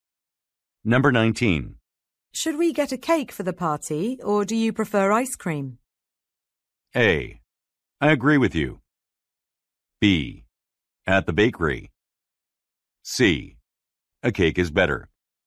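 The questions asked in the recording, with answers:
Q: Should we get a cake for the party, or do you prefer ice cream?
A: C: A cake is better.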